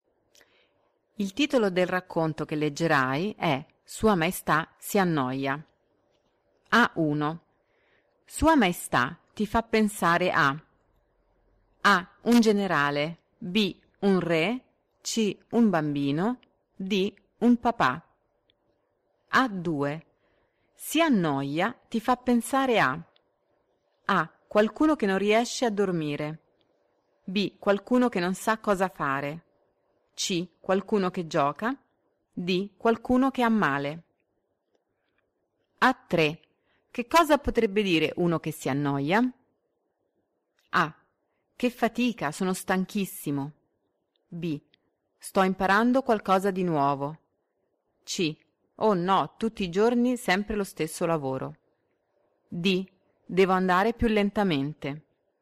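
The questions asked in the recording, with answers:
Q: Sua Maestà ti fa pensare a A.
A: B: Un re

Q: Si annoia ti fa pensare a A.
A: B: Qualcuno che non sa cosa fare

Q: Che cosa potrebbe dire uno che si annoia?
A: C: Oh no, tutti i giorni sempre lo stesso lavoro.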